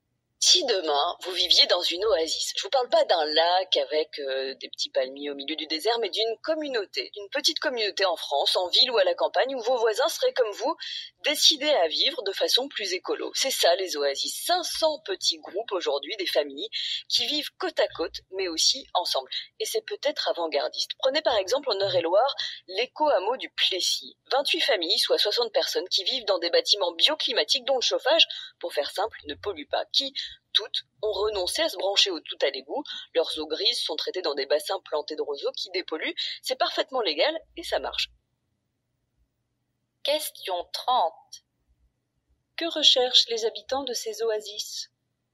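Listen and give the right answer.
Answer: Vivre de façon plus écologique, en communauté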